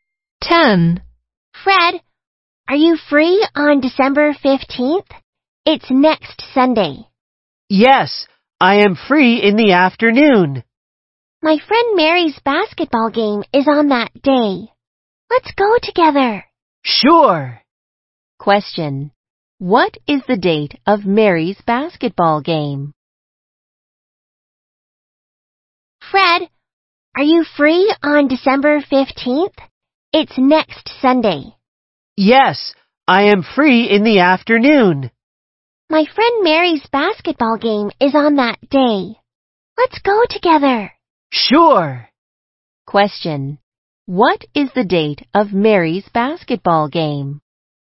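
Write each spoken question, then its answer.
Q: What is the date of Mary's basketball game?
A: December 15th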